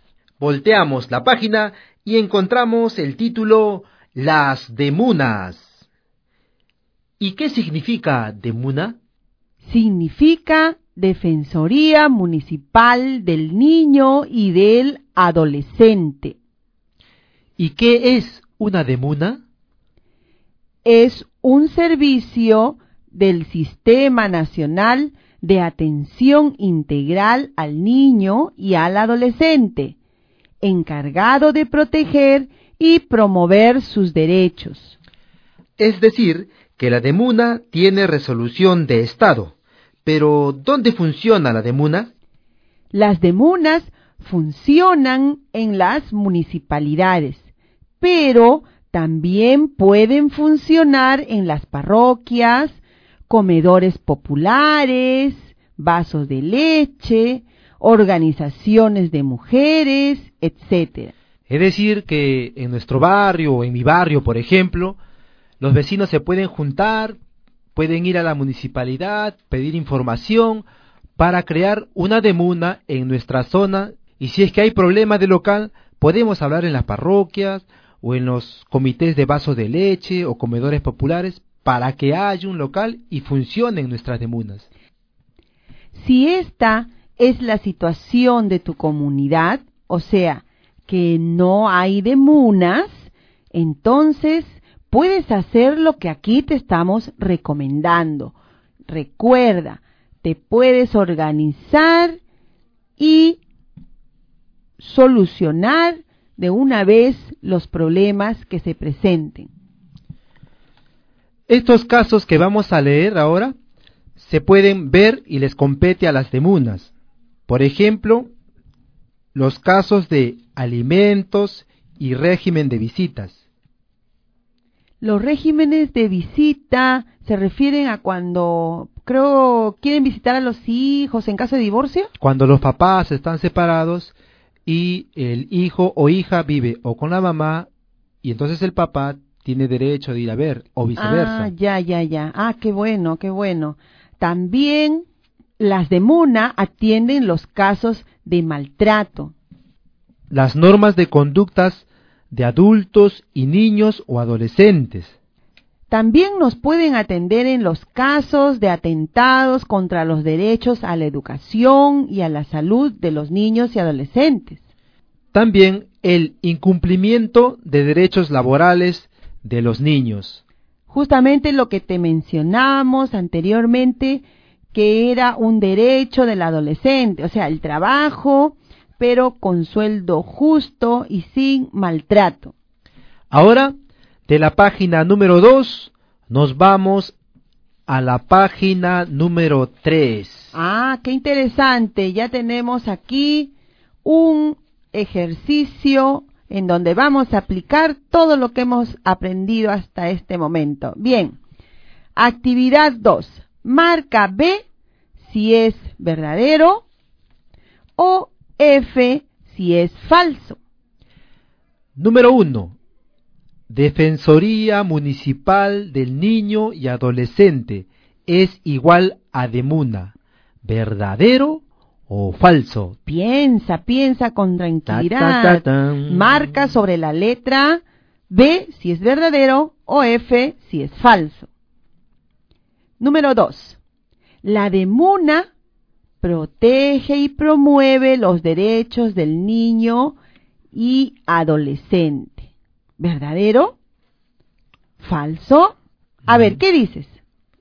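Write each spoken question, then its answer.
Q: Defensoría Municipal del Niño y Adolescente es igual a de MUNA.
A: Verdadero

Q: La de MUNA protege y promueve los derechos del niño y adolescente.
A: Verdadero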